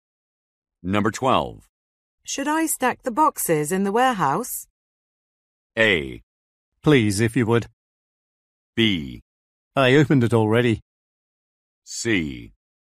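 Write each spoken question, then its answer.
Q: Should I stack the boxes in the warehouse?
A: A: Please, if you would.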